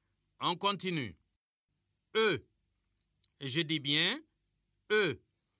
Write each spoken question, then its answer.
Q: On continue. E. Je dis bien E.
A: Monsieur, la lettre qui vient avant E, c'est D.